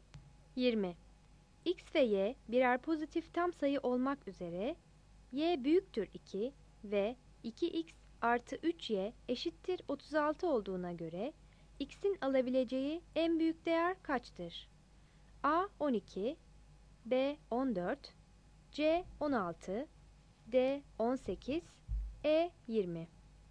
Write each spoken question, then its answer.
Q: X ve Y birer pozitif tam sayı olmak üzere Y büyüktür 2 ve 2x artı 3y eşittir 36 olduğuna göre x'in alabileceği en büyük değer kaçtır?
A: 20 A